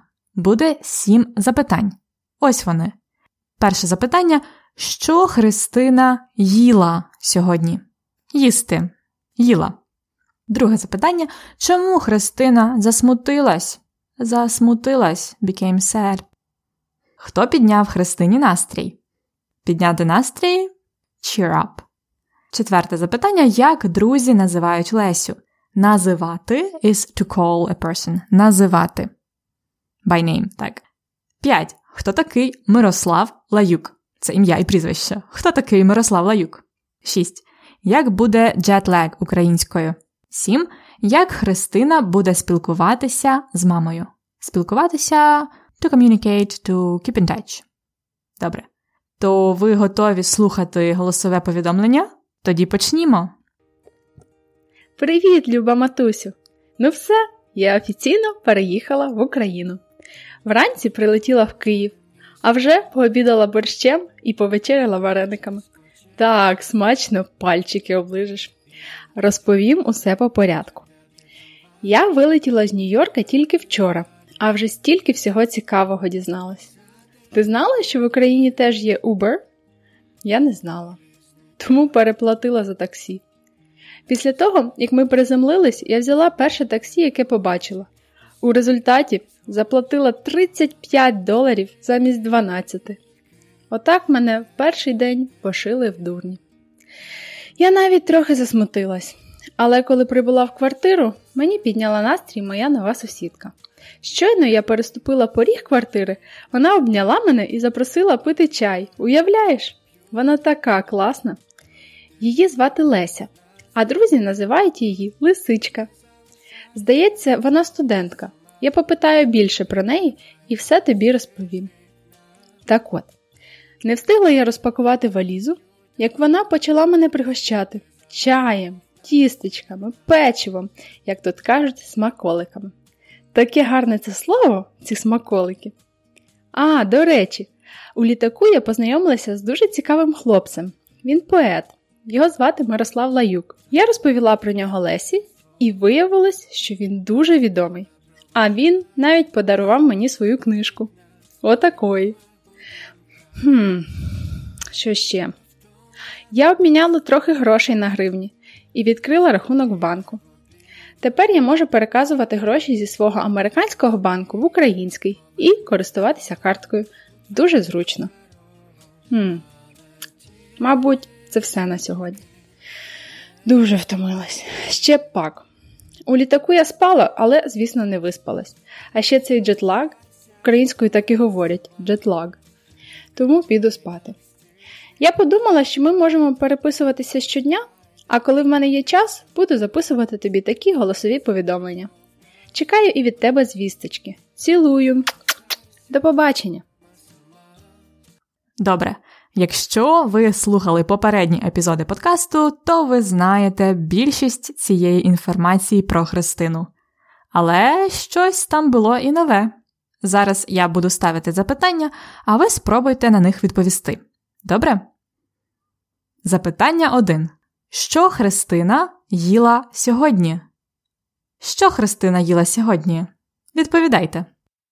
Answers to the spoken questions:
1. Якщо просто, то Христина їла борщ і вареники.
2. Вона засмутилась, тому що її пошили в дурні.
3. Христині підняла настрій її нова сусідка Леся.
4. Друзі називають Лесю лисичка.
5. Мирослав Лаюк це відомий поет.
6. Христина так і каже: українською джетлег так і буде.
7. Вони будуть переписуватись щодня.